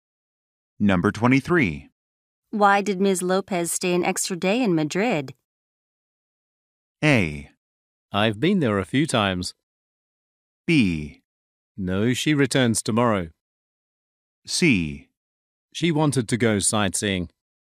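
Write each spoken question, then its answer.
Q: Why did Ms. Lopez stay an extra day in Madrid?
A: C: She wanted to go sightseeing.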